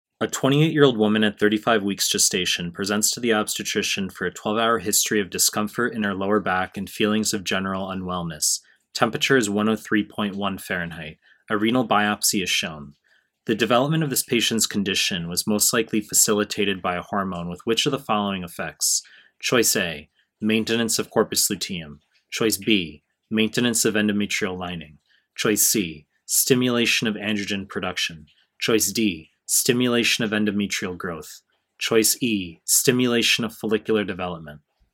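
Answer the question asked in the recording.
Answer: B: maintenance of endometrial lining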